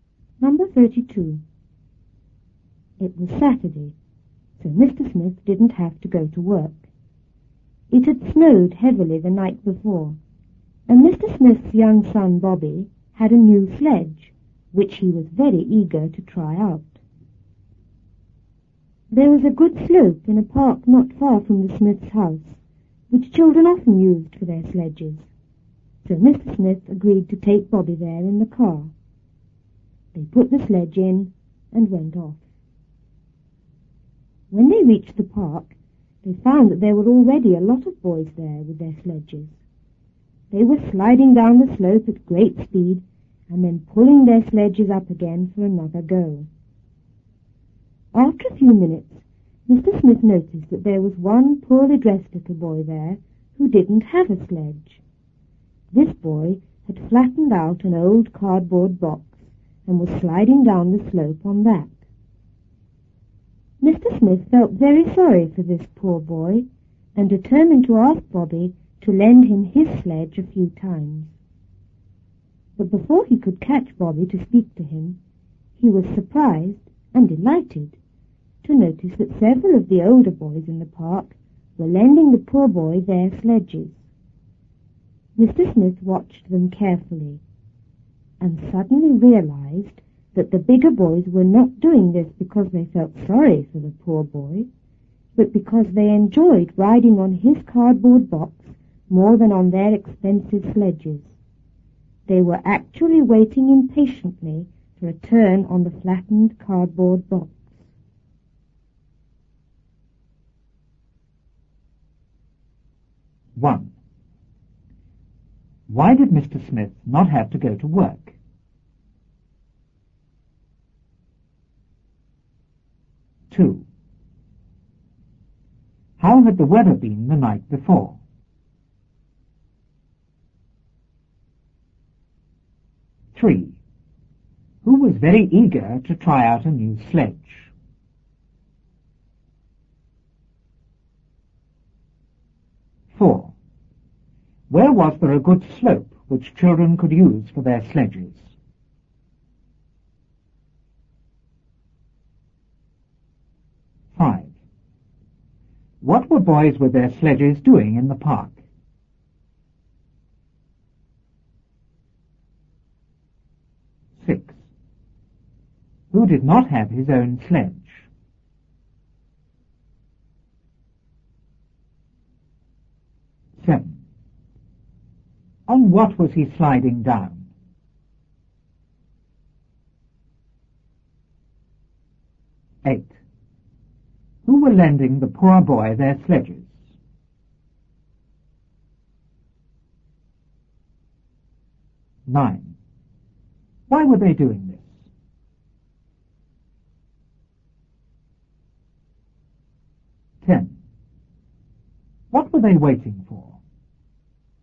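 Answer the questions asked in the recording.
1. Because it was Saturday
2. It had snowed heavily
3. Bobby, Mr. Smith's young son
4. In a park not far from the Smiths' house
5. Sliding down the slope at great speed and pulling their sledges up again
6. A poorly dressed little boy
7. A flattened old cardboard box
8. Several of the older boys
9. They enjoyed riding on his cardboard box more than on their expensive sledges
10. A turn on the flattened cardboard box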